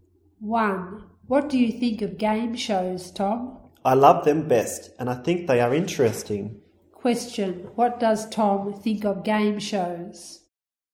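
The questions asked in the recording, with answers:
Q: Question, what does Tom think of game shows?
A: He loves them and thinks they are interesting.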